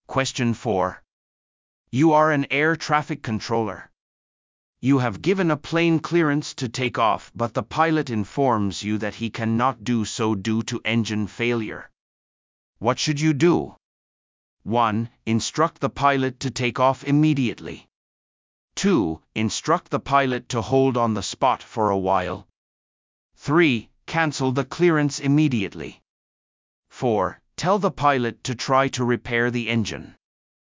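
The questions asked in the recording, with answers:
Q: What should you do?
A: 3: Cancel the clearance immediately.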